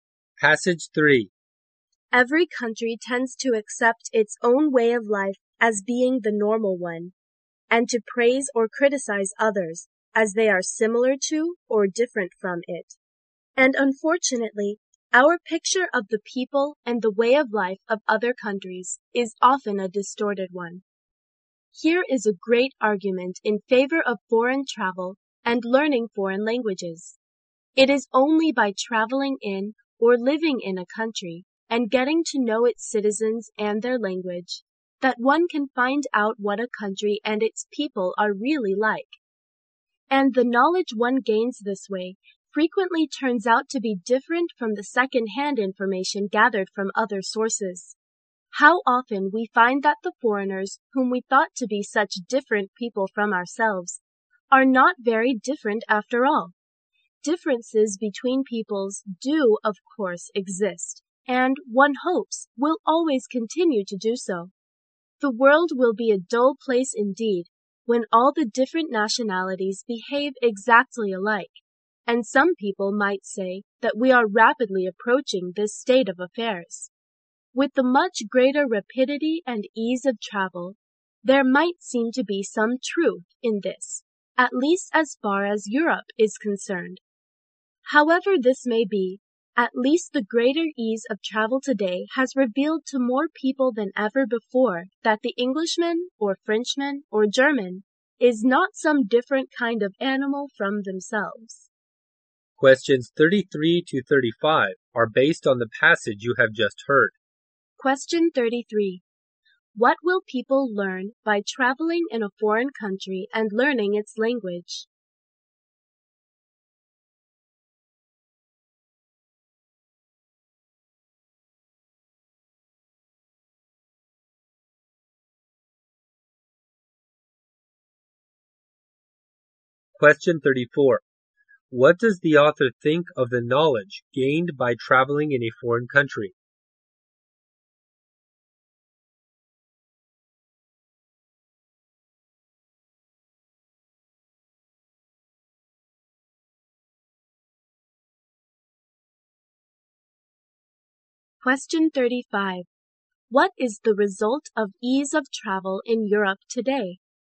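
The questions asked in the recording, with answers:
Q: What will people learn by traveling in a foreign country and learning its language?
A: What the country and its people are really like.

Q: What does the author think of the knowledge gained by traveling in a foreign country?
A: It often differs from second-hand information.

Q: What is the result of ease of travel in Europe today?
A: More people realize that foreigners are not so different from themselves.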